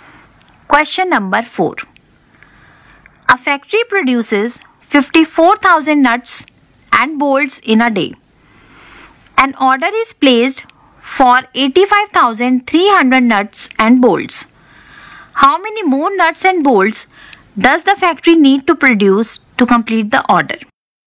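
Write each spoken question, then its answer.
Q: How many more nuts and bolts does the factory need to produce to complete the order?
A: 31,300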